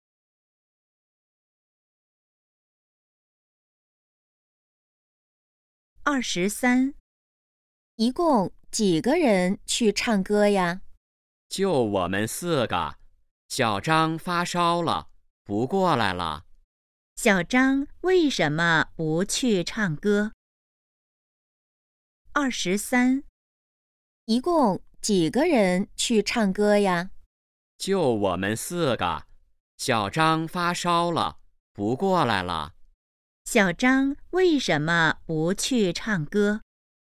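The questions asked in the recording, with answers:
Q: 小张为什么不去唱歌?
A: 发烧了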